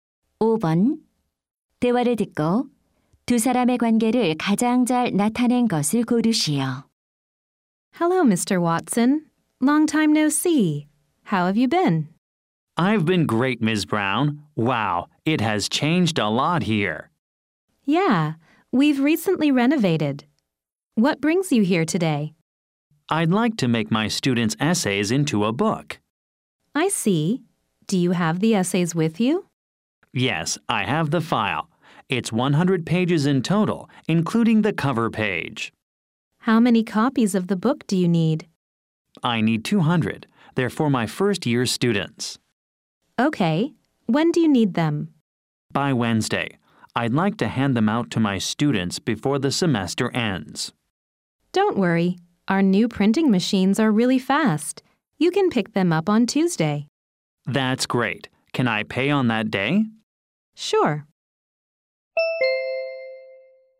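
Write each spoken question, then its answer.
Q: 대화를 듣고 두 사람의 관계를 가장 잘 나타낸 것을 고르시오.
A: 교사 - 인쇄소 직원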